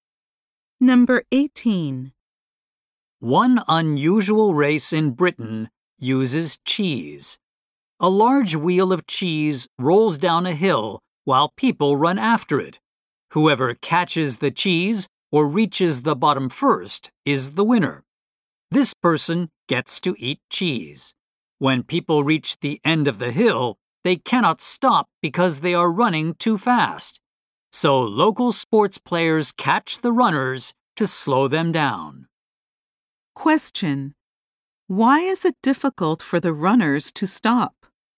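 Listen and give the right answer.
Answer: They are running too fast.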